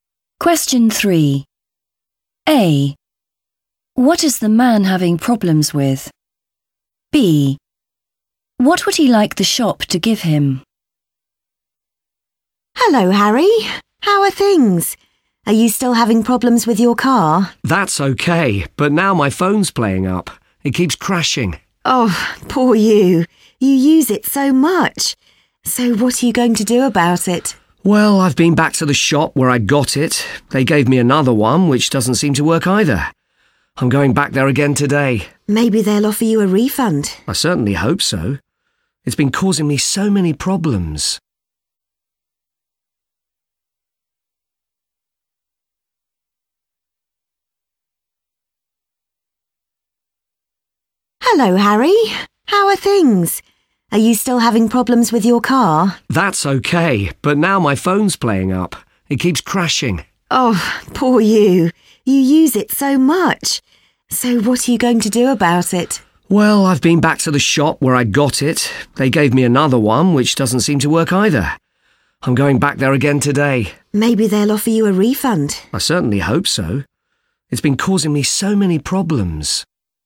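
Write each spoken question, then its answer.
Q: What is the man having problems with?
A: his phone

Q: What would he like the shop to give him?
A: a refund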